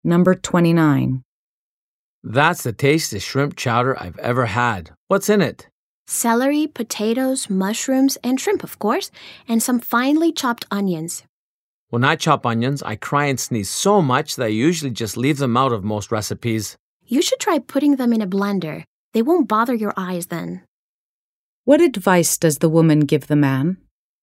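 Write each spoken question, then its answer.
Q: What advice does the woman give the man?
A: To chop the onions in a blender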